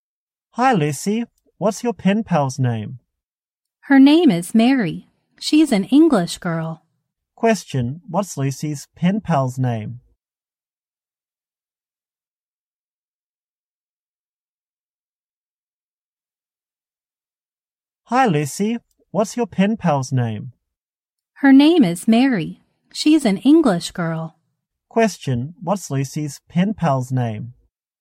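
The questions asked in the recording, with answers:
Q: what's Lucy's pen pal's name?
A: Mary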